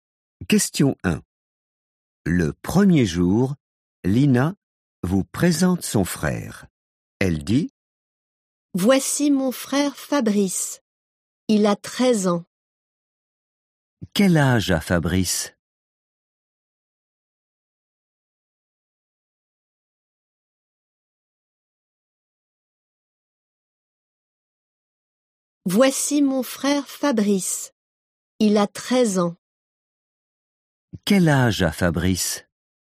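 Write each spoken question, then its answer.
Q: Quel âge a Fabrice?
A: 13 ans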